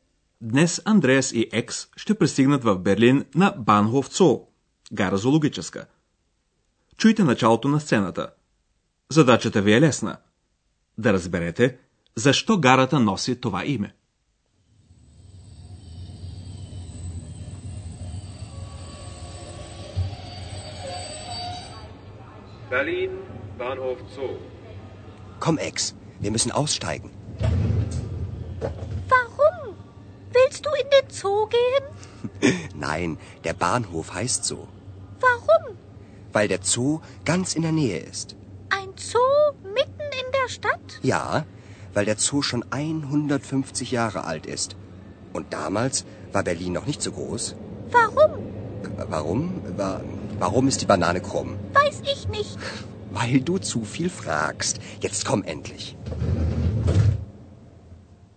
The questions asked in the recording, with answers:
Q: Да разберете защо гарата носи това име.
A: Гарата се нарича Цо, защото наблизо е зоологическата градина.